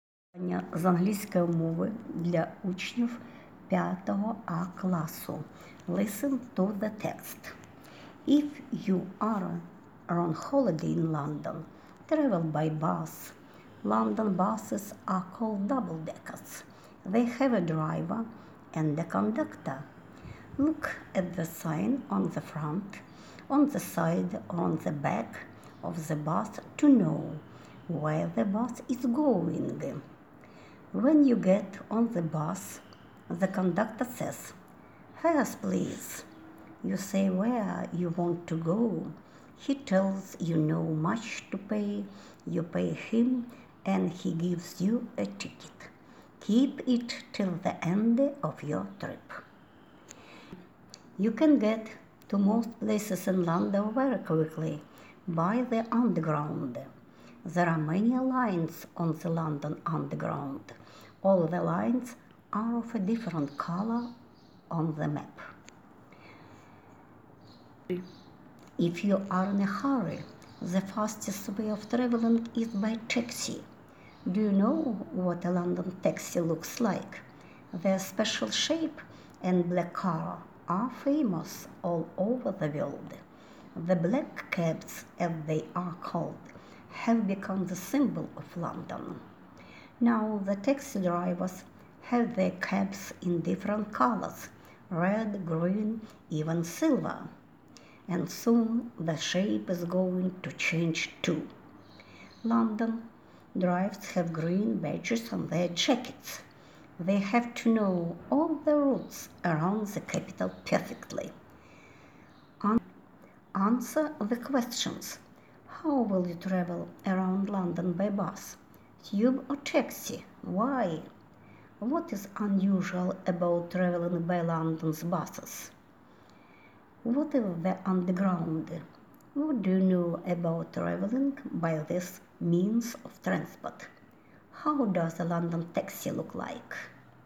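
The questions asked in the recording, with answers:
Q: What is unusual about traveling by London's buses?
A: They are double deckers with a driver and a conductor; the conductor takes your fare and gives you a ticket

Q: How does a London taxi look like?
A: It has a special shape and is black (a black cab), though now some are red, green or silver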